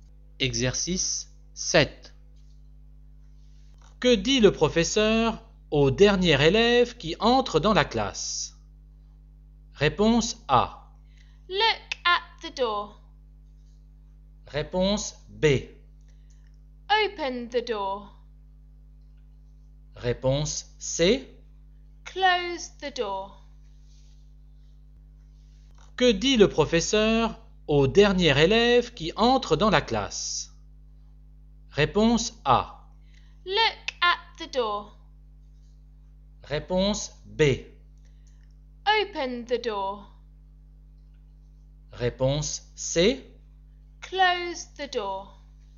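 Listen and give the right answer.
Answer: C: Close the door.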